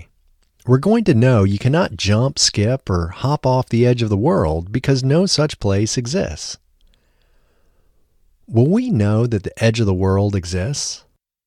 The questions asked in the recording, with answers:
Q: Will we know that the edge of the world exists?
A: No, we will not know that the edge of the world exists.